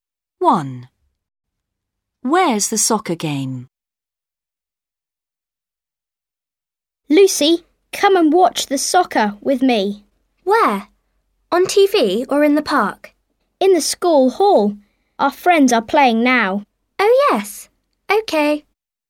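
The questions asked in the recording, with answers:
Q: Where's the soccer game?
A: In the school hall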